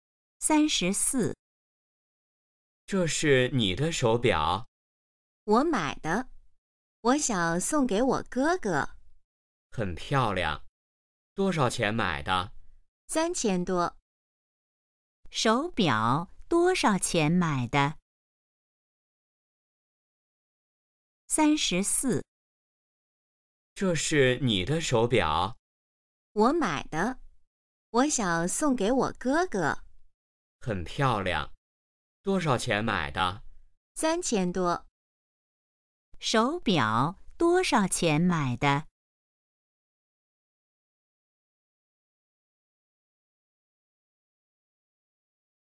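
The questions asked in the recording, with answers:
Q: 手表多少钱买的?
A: 3000多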